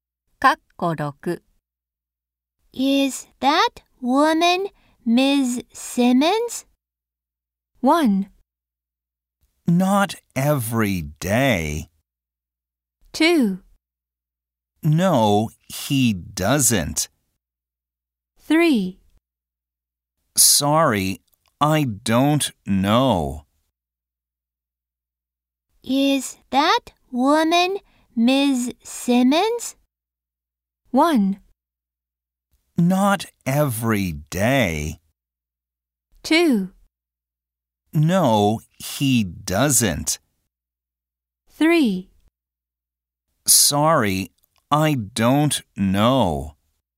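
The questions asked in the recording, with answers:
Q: Is that woman Ms. Simmons?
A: 3: Sorry, I don't know.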